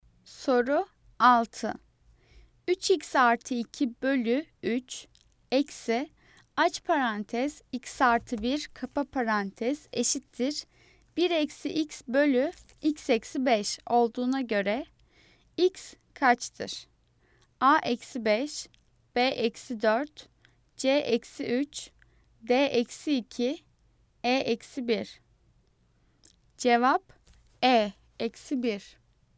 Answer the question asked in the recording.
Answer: Cevap E eksi 1.